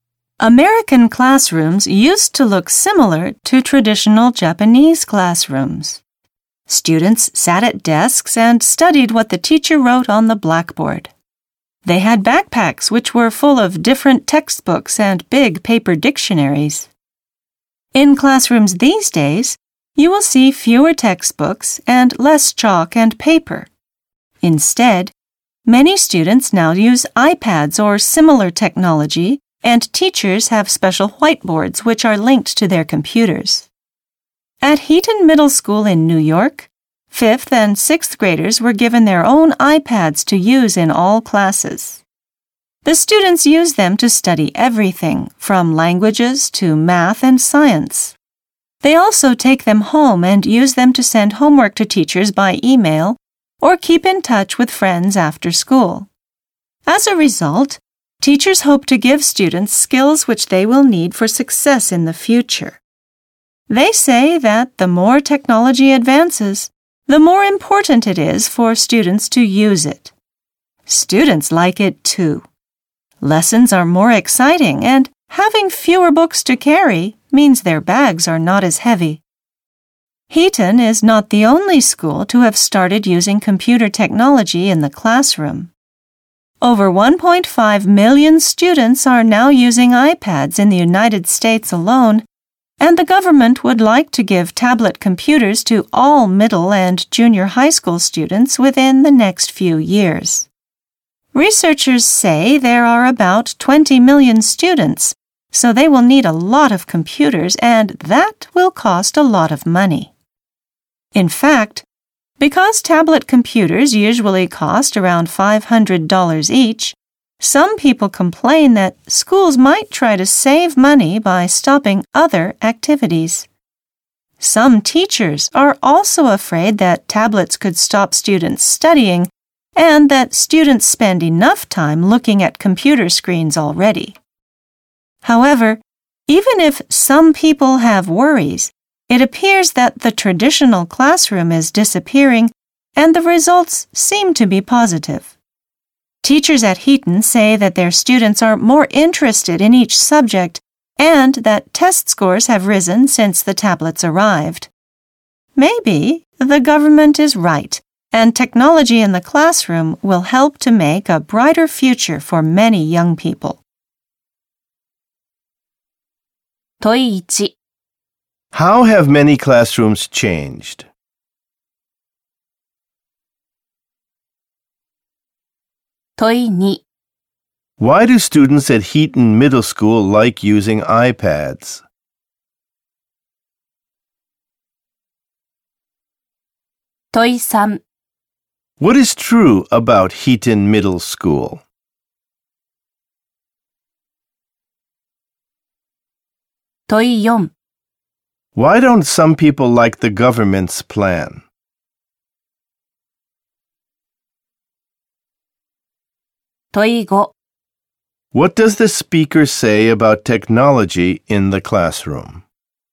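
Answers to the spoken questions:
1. Students use iPads or similar technology instead of textbooks, chalk and paper
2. Lessons are more exciting and their bags are lighter
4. It costs a lot, so schools might stop other activities to save money
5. It may help make a brighter future for many young people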